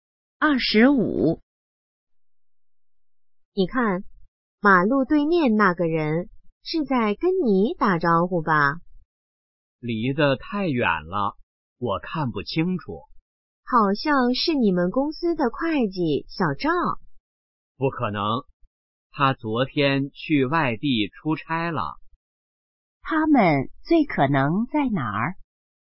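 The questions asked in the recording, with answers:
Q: 他们最可能在哪儿?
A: 马路边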